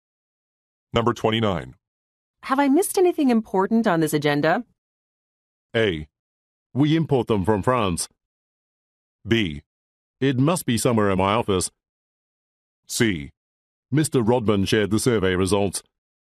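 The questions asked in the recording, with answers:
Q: Have I missed anything important on this agenda?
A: C: Mr. Rodman shared the survey results.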